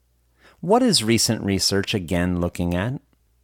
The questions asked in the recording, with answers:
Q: What is recent research again looking at?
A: Recent research is again looking at the healing potential of young blood.